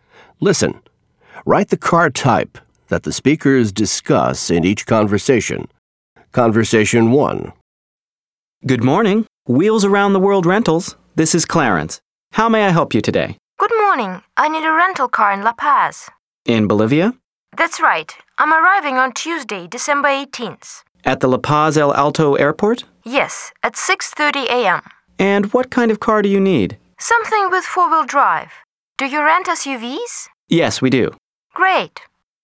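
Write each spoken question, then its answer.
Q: Listen. Write the car type that the speakers discuss in each conversation.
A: an SUV (four-wheel drive)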